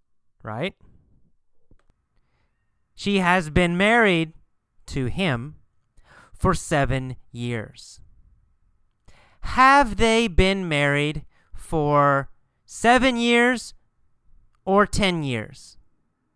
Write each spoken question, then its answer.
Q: Have they been married for 7 years or 10 years?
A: Well, they have been married for 7 years.